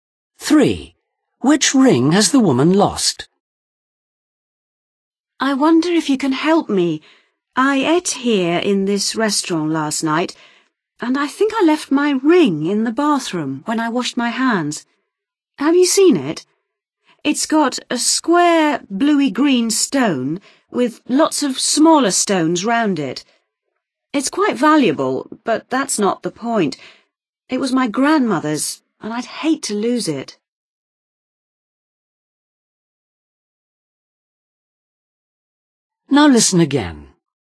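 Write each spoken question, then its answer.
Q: Which ring has the woman lost?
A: a ring with a square bluey-green stone surrounded by smaller stones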